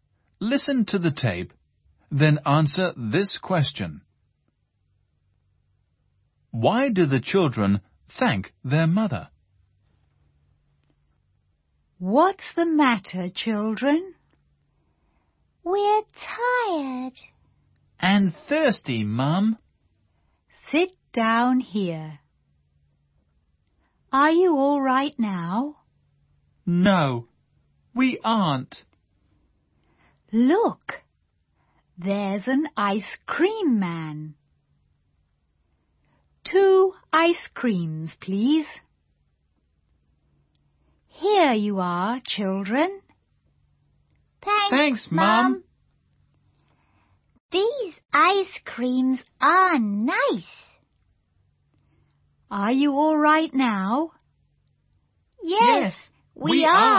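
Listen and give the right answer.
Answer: Because she buys them ice creams.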